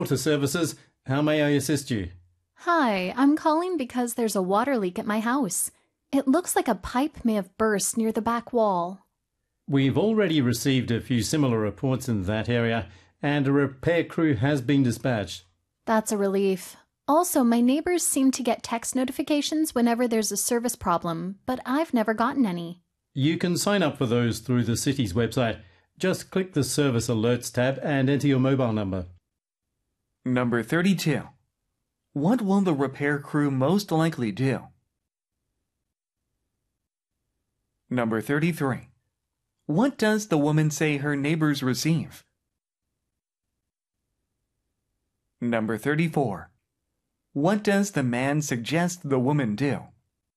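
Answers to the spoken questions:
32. A번 repair a damaged pipe.
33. Text notifications about service problems
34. Sign up for alerts on the city's website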